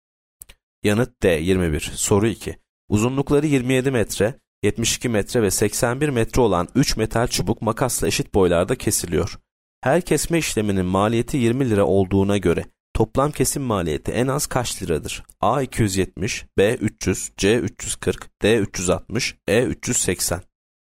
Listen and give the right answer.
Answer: Yanıt C 340.